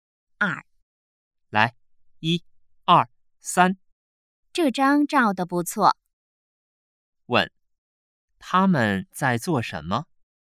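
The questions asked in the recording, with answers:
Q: 问,他们在做什么?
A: 照相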